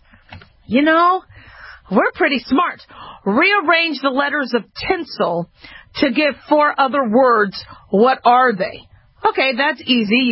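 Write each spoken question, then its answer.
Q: Rearrange the letters of tinsel to give 4 other words.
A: listen, silent, enlist, inlets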